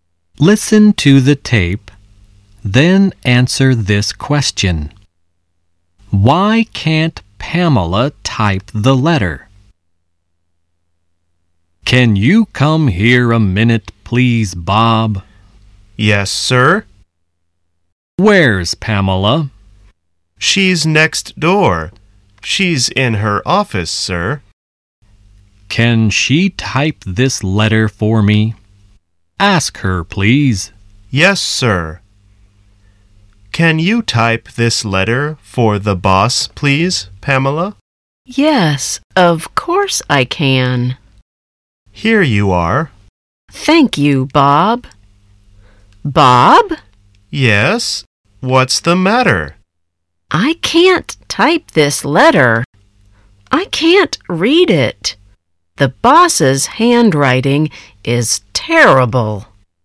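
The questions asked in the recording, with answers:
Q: Why can't Pamela type the letter?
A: Because she can't read it; the boss's handwriting is terrible.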